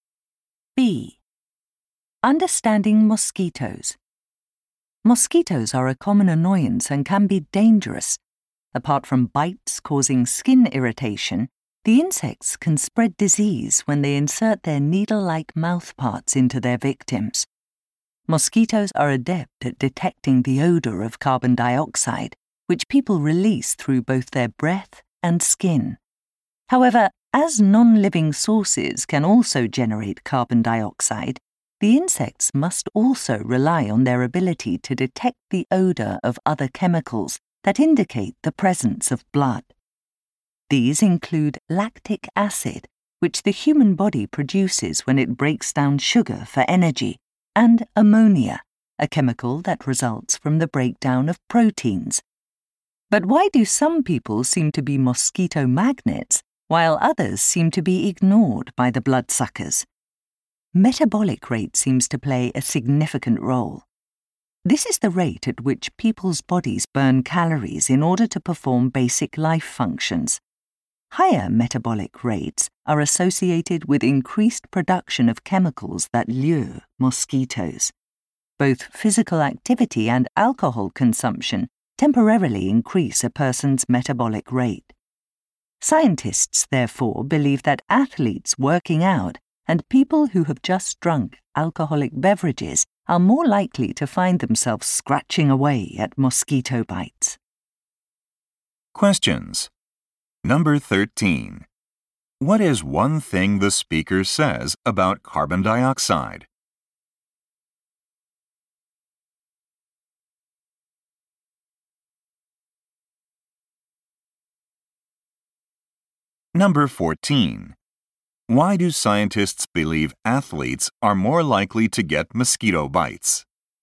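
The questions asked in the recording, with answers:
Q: What is one thing the speaker says about carbon dioxide?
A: Mosquitoes can detect its odor, but non-living sources can also generate it.

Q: Why do scientists believe athletes are more likely to get mosquito bites?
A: Working out raises their metabolic rate, which increases production of chemicals that attract mosquitoes.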